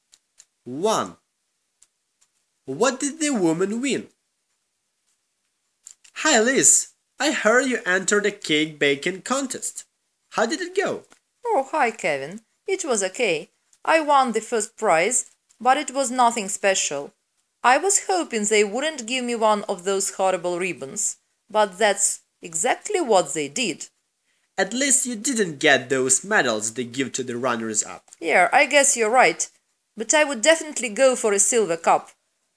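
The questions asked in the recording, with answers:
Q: What did the woman win?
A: A ribbon (first prize)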